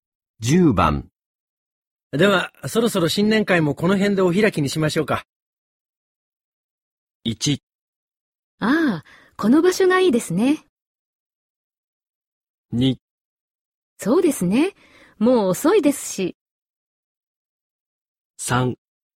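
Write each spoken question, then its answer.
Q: では、そろそろ新年会もこの辺でお開きにしましょうか。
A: 2: そうですね。もう遅いですし。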